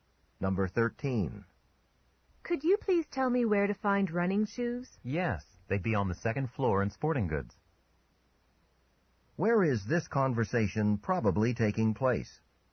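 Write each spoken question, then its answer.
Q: Where is this conversation probably taking place?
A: In a department store.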